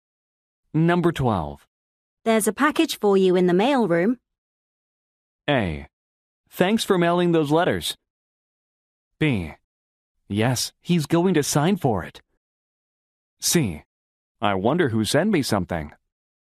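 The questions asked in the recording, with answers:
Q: There's a package for you in the mail room.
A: C: I wonder who sent me something.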